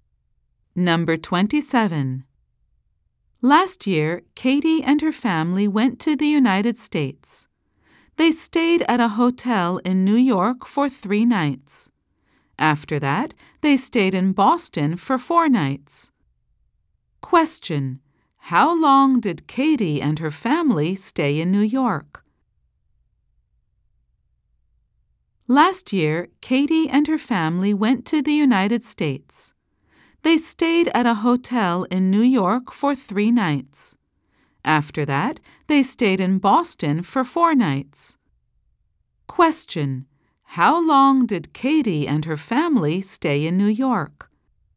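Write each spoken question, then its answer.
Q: How long did Katie and her family stay in New York?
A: 3 nights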